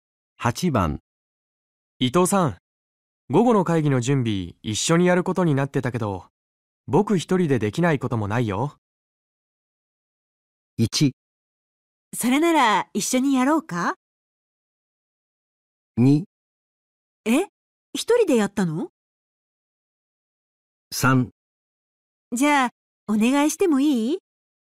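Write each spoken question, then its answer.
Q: 伊藤さん午後の会議の準備一緒にやることになってたけど僕一人でできないこともないよ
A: 3: じゃあお願いしてもいい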